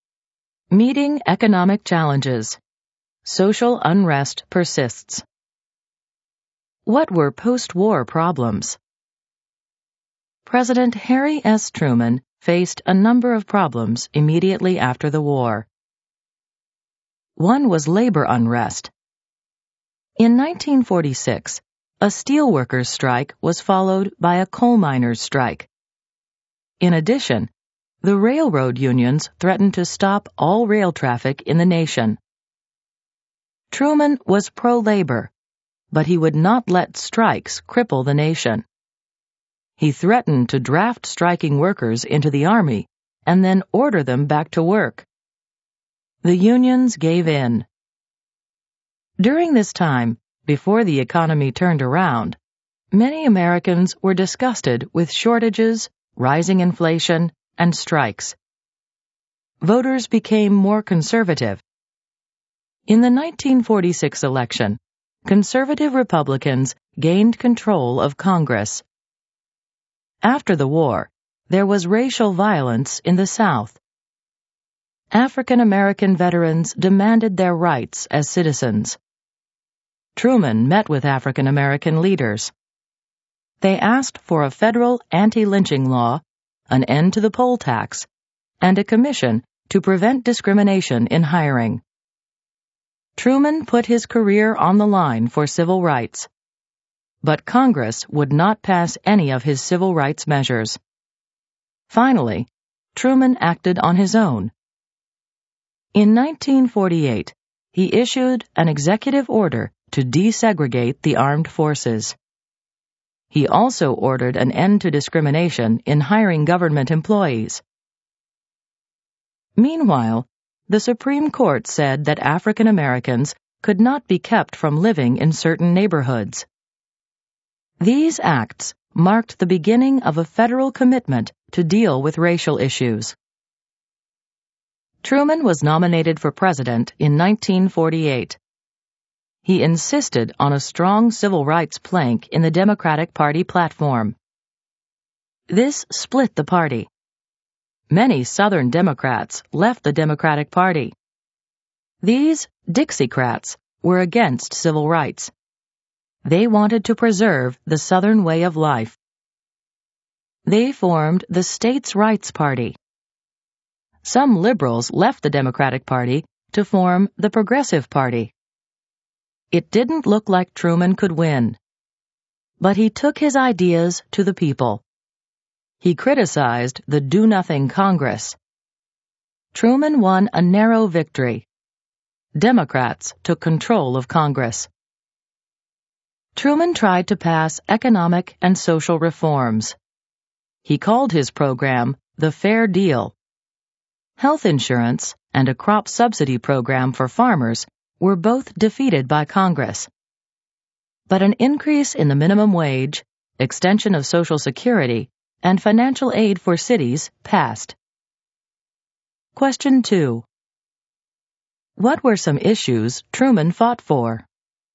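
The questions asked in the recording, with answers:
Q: What were some issues Truman fought for?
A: Civil rights (an anti-lynching law, an end to the poll tax, fair hiring, desegregating the armed forces) and Fair Deal reforms (health insurance, farm subsidies, a higher minimum wage, Social Security)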